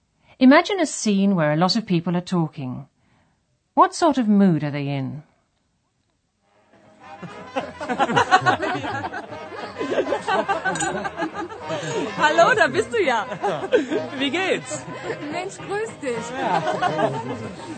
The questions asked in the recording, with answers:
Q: What sort of mood are they in?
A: That was a party atmosphere where people are enjoying themselves.